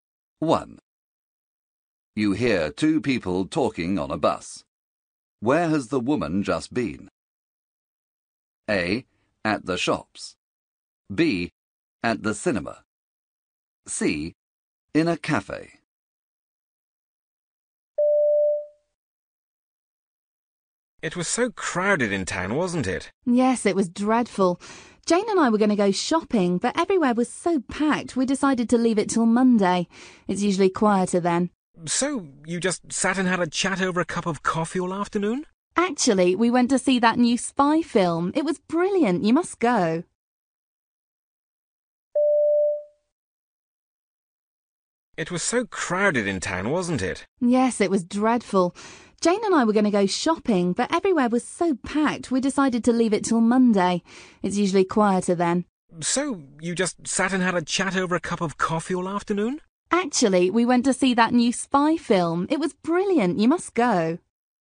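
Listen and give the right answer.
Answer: B: At the cinema.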